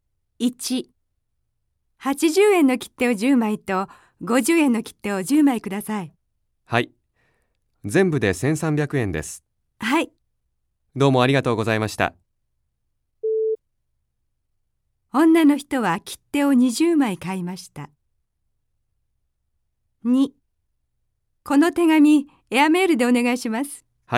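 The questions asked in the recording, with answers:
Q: 女の人は切手を20枚買いました。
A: はい(正しい)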